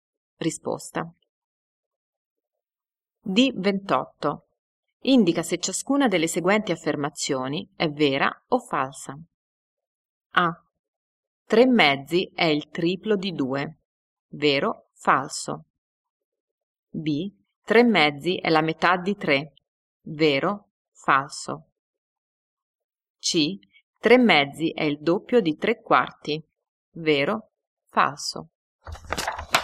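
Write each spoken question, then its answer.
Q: 3 mezzi è il triplo di 2.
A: Falso

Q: 3 mezzi è la metà di 3.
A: Vero

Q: 3 mezzi è il doppio di 3 quarti.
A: Vero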